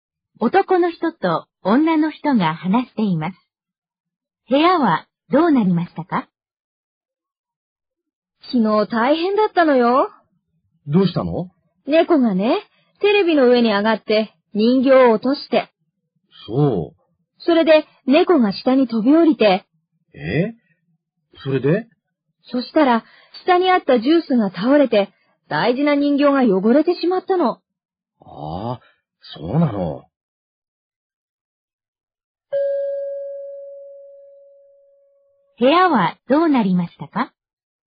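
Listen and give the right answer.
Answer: 人形が落ちて、倒れたジュースで汚れた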